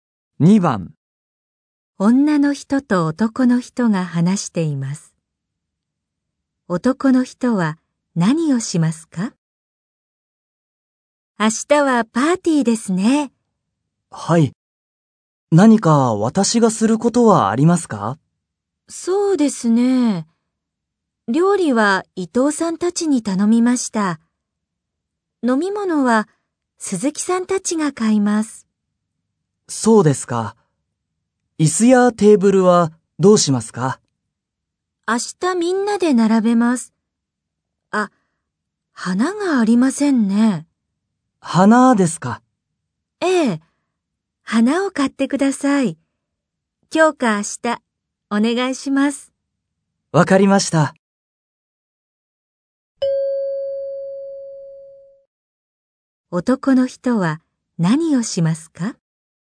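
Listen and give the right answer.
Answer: 花を買う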